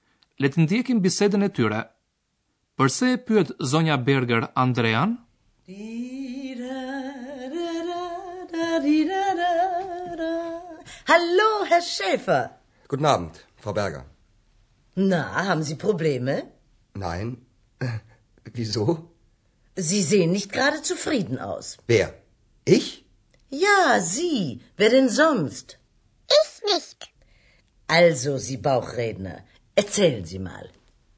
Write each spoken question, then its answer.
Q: Përse e pyet zonja Berger Andrean?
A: Sonja Berger e pyet Andrean nëse i kanë dalë probleme.